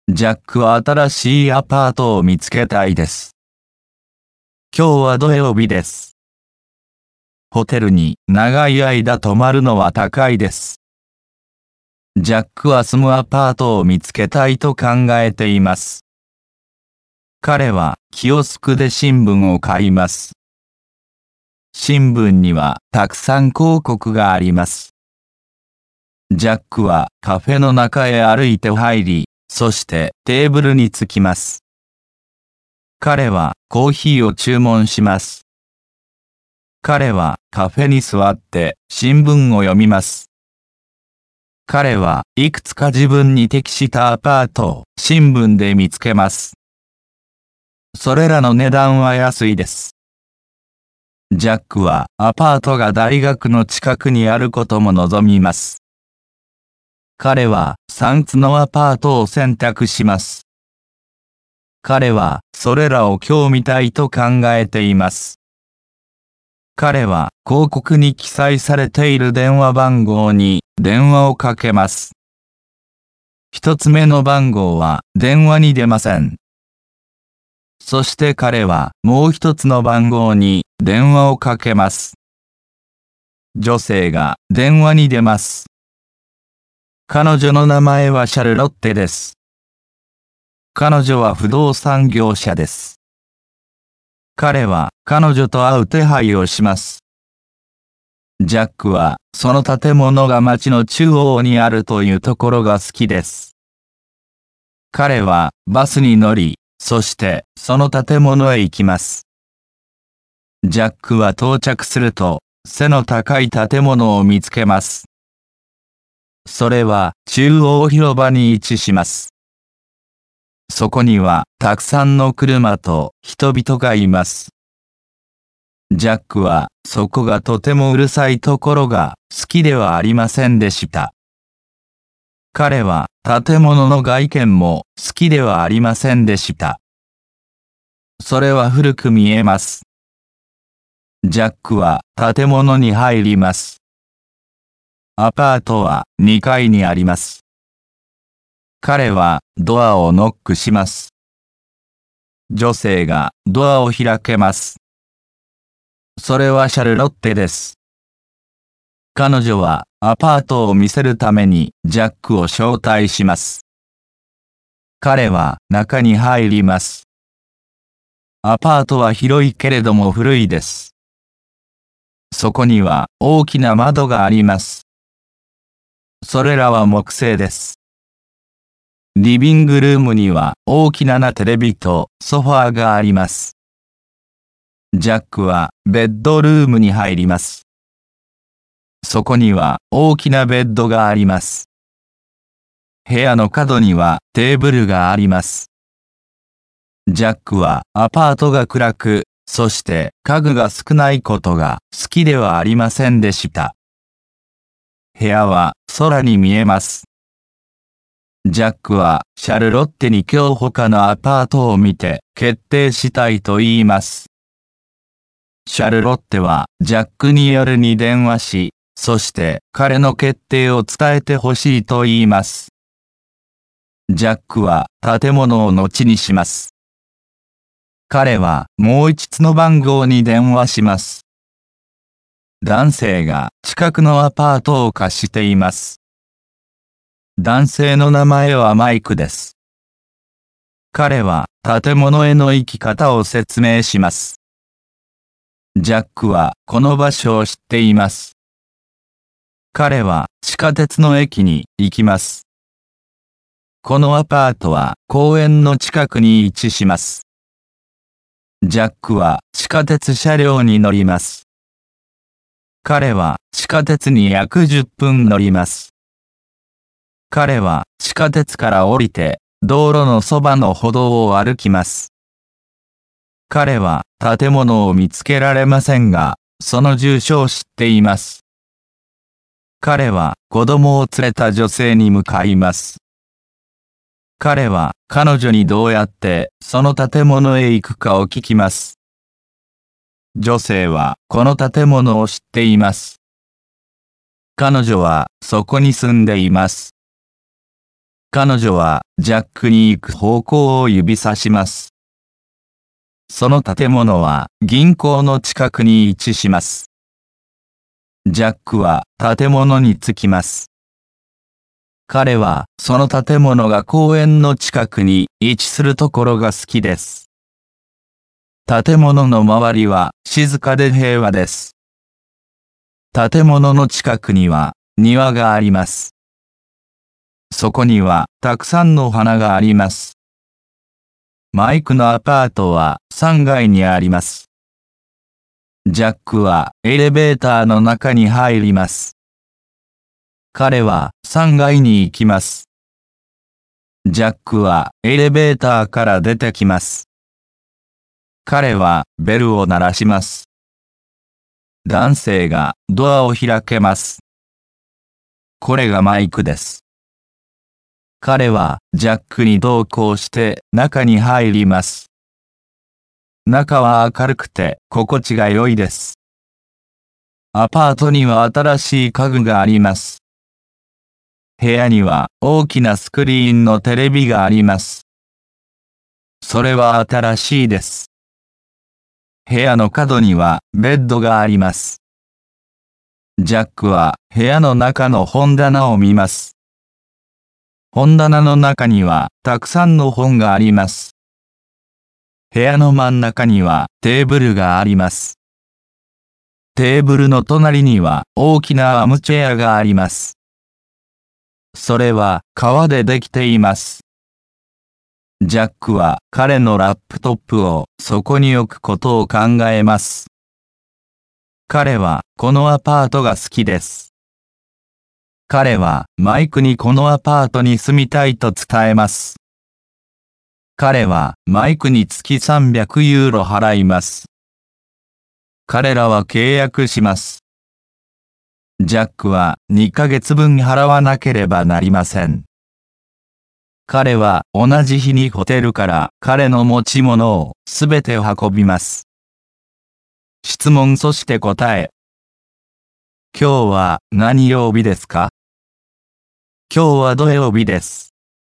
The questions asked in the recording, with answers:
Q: 今日は何曜日ですか?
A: 今日は土曜日です。